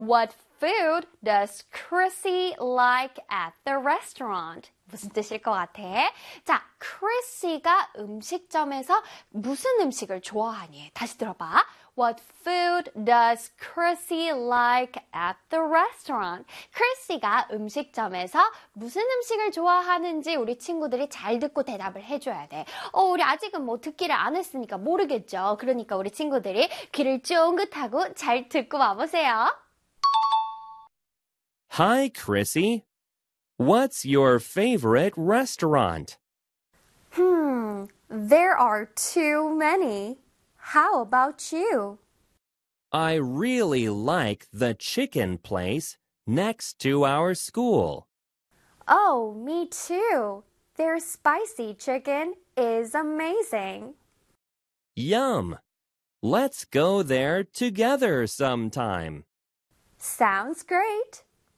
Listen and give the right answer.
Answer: 그래서 정답은 spicy chicken 되겠습니다.